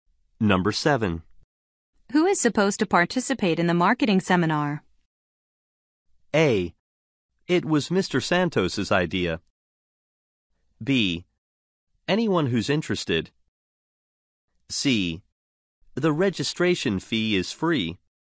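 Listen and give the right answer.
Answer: B: Anyone who's interested.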